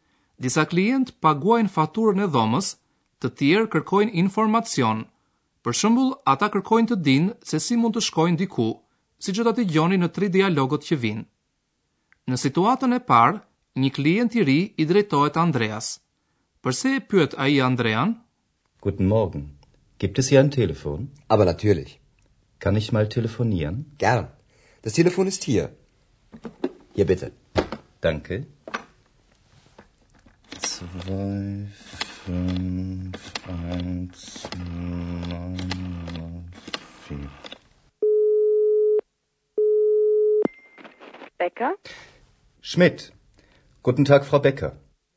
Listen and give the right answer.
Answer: Klienti pyet nëse aty pranë ndodhet ndonjë telefon ku mund të flas ai.